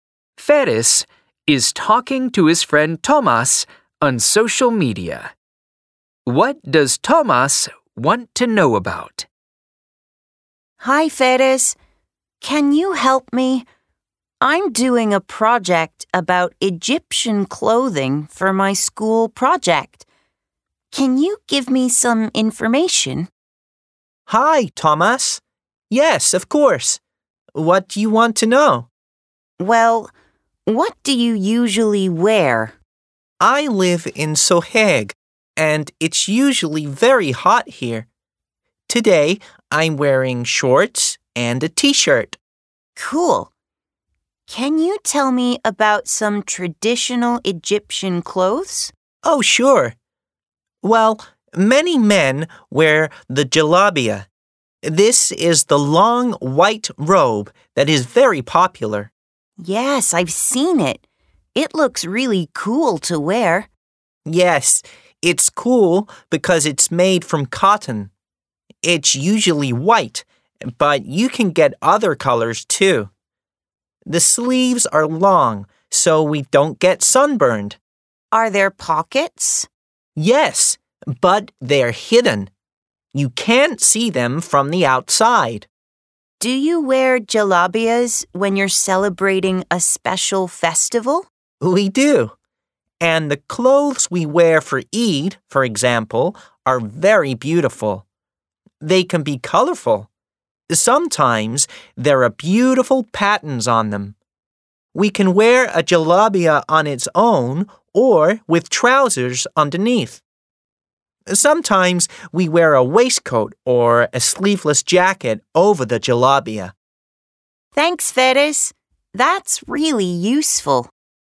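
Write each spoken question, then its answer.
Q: What does Tomas want to know about?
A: Egyptian clothing (traditional Egyptian clothes)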